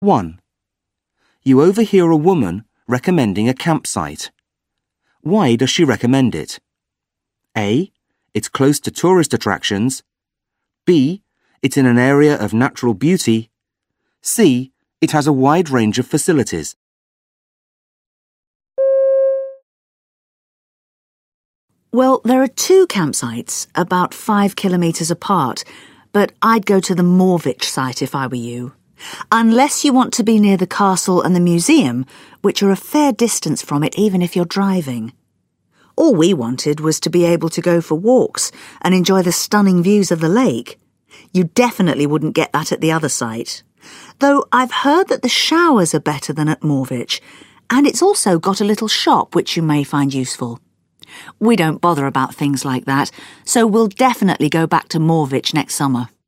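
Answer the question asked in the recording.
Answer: B: It's in an area of natural beauty.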